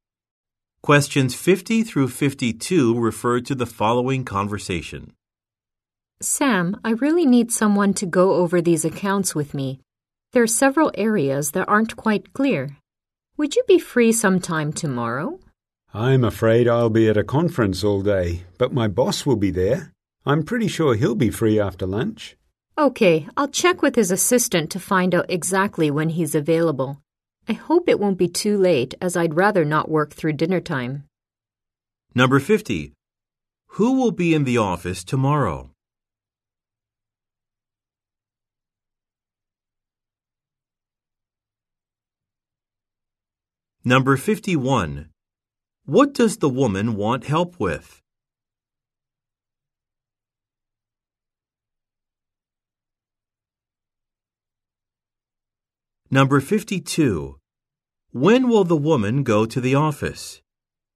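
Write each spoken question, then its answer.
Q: Who will be in the office tomorrow?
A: Sam's boss

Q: What does the woman want help with?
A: Going over accounts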